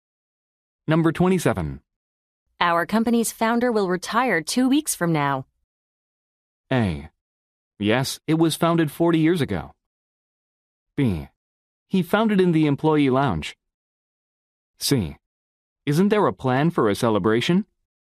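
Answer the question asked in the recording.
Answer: C: Isn't there a plan for a celebration?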